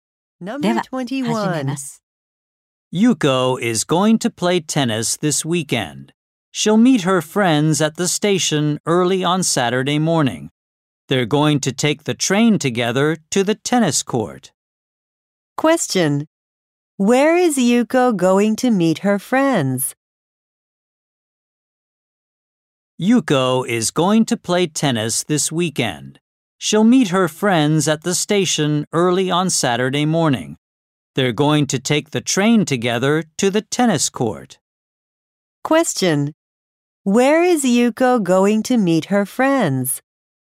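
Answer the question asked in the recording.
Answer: At the station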